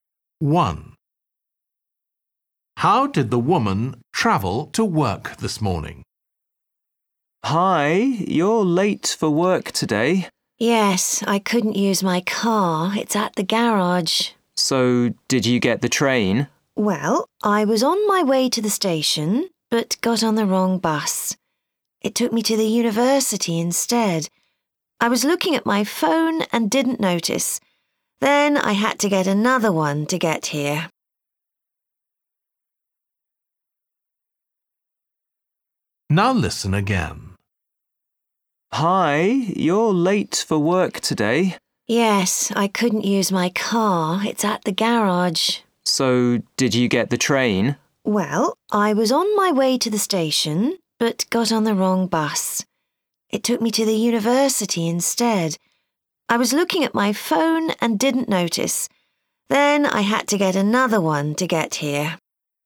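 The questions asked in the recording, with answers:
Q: How did the woman travel to work this morning?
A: By bus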